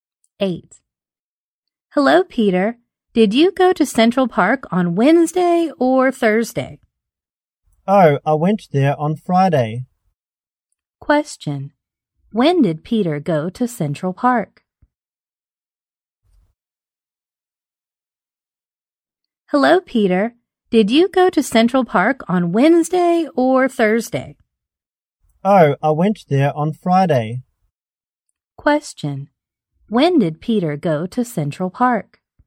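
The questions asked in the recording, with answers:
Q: When did Peter go to Central Park?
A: On Friday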